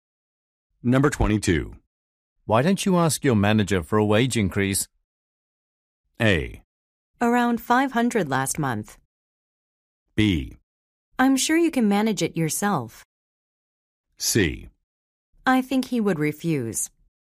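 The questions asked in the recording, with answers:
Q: Why don't you ask your manager for a wage increase?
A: C: I think he would refuse.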